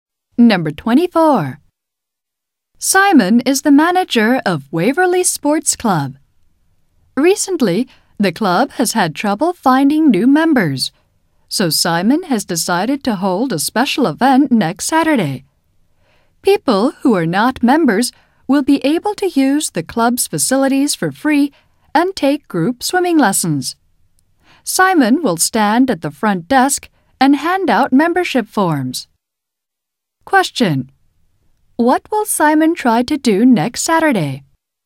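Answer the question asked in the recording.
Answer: Get new members for the club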